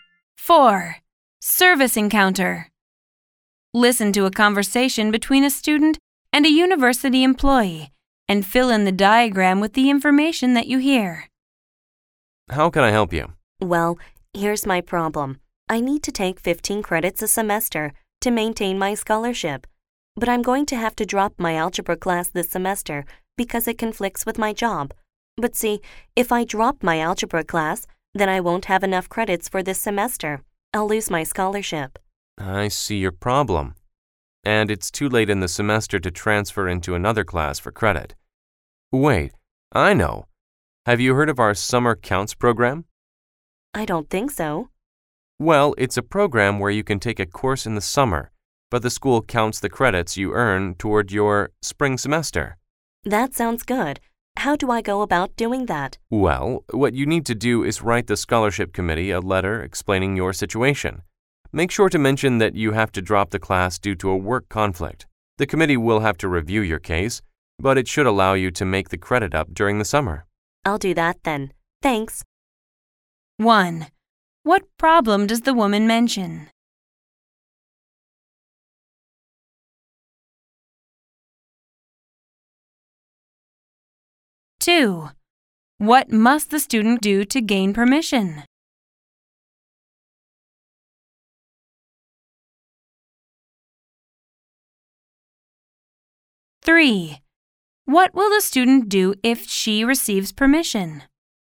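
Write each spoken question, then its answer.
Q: What problem does the woman mention?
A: She must drop her algebra class because it conflicts with her job, so she won't have enough credits and will lose her scholarship

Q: What must the student do to gain permission?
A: Write the scholarship committee a letter explaining her situation (the work conflict)

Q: What will the student do if she receives permission?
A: Take a course in the summer through the Summer Counts program to make up the credits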